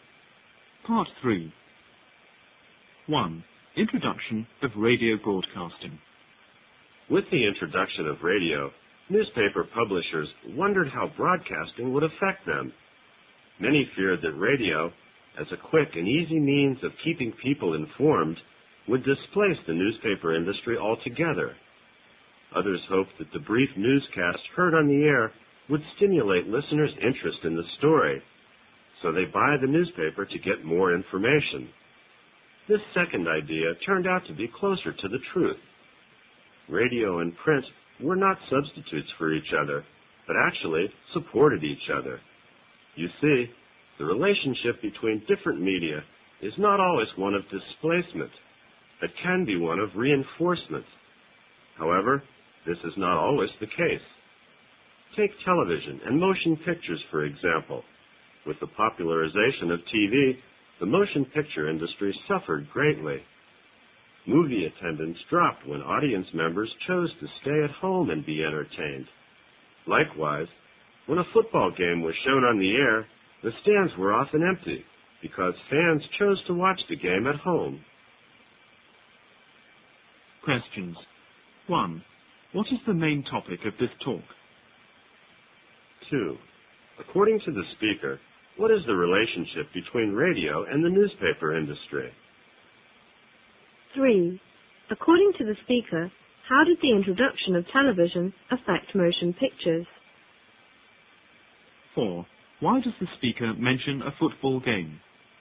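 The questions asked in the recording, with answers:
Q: What is the main topic of this talk?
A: How new media such as radio and television affected older media

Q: According to the speaker, what is the relationship between radio and the newspaper industry?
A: They supported each other; radio reinforced newspapers rather than replacing them

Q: According to the speaker, how did the introduction of television affect motion pictures?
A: The film industry suffered greatly because fewer people went to the cinema

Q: Why does the speaker mention a football game?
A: As another example of TV replacing an older form, since fans stayed home to watch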